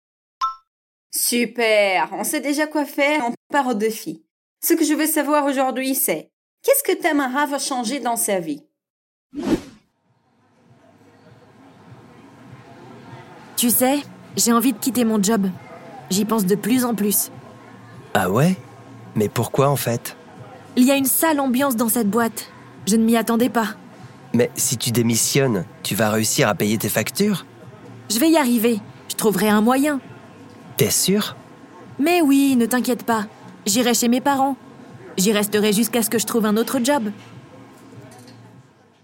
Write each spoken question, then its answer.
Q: qu'est-ce que Tamara va changer dans sa vie?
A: Tamara veut quitter son travail.